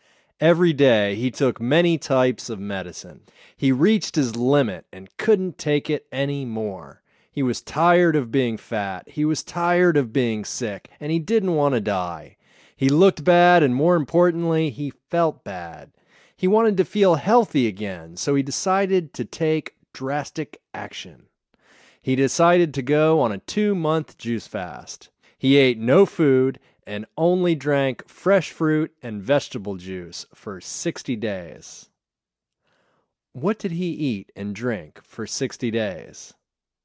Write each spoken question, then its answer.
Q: What did he eat and drink for 60 days?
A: He ate no food and only drank fresh fruit and vegetable juice for 60 days.